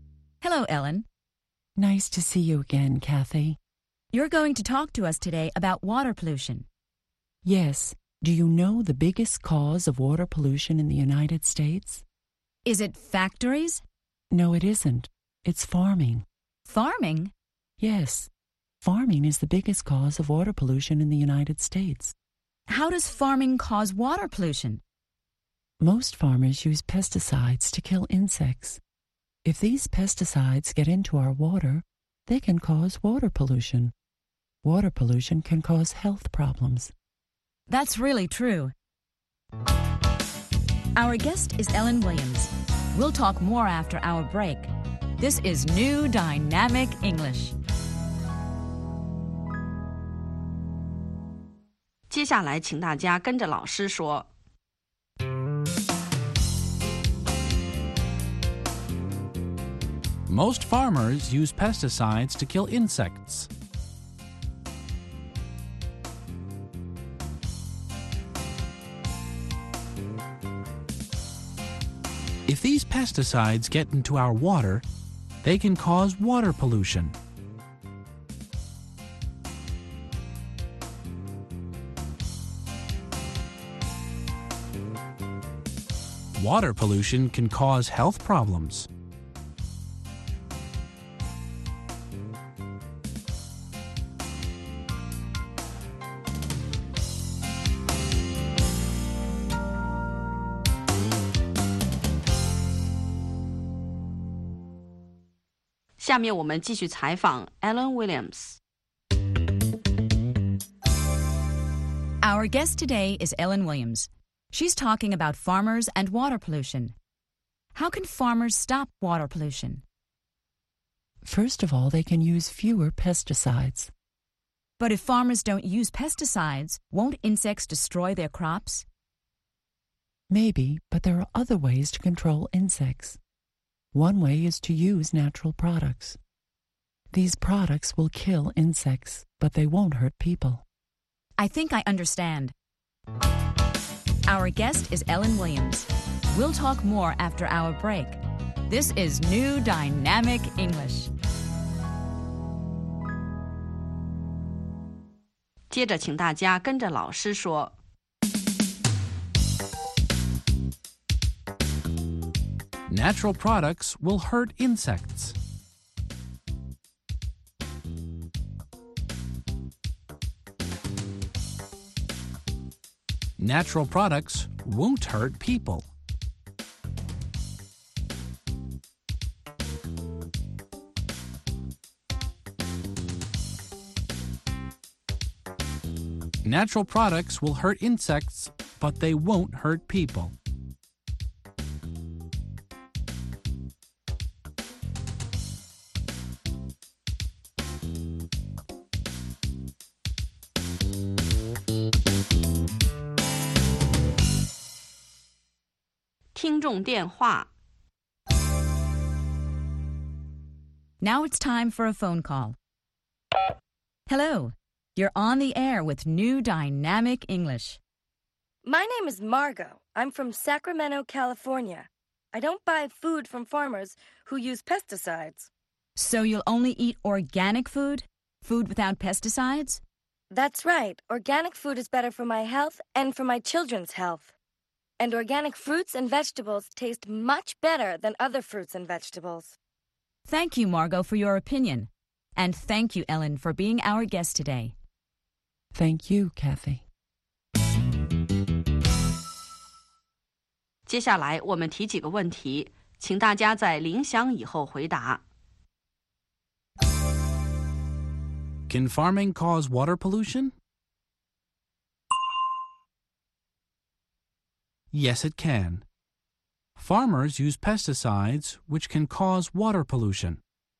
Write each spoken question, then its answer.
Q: Can farming cause water pollution?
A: Yes, it can. Farmers use pesticides, which can cause water pollution.